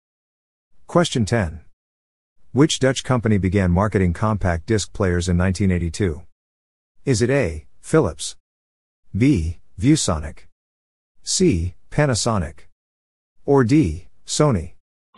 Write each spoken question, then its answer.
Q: Which Dutch company began marketing compact disc players in 1982?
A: The answer is A, Philips.